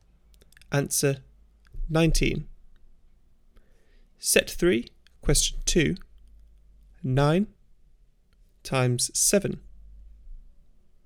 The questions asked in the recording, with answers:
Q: 9 times 7.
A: Answer 63.